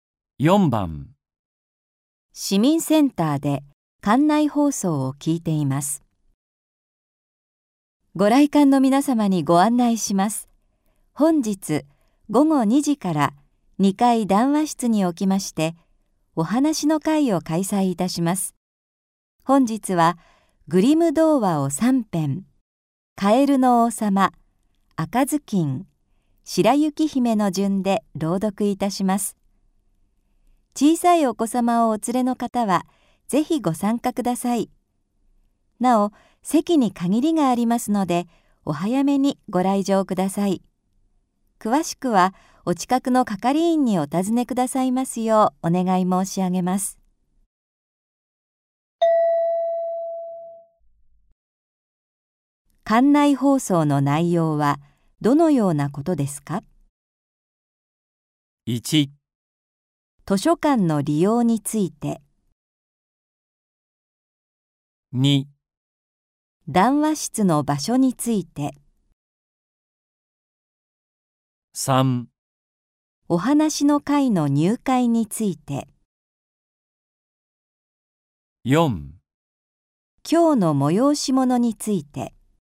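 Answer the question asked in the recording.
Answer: 4: 今日の催し物について。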